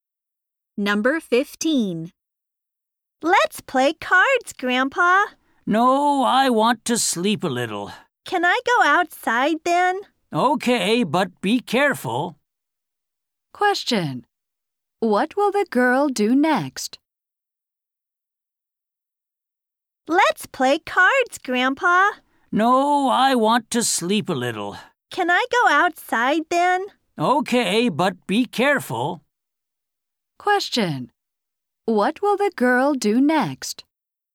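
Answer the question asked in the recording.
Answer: Go outside.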